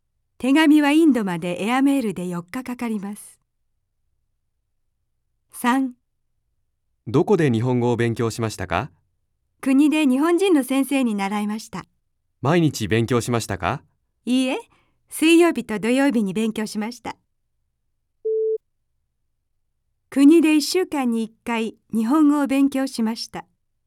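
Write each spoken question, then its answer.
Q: 国で1週間に1回日本語を勉強しました。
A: いいえ(水曜日と土曜日、1週間に2回)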